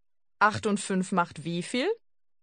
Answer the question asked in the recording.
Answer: 13. 13.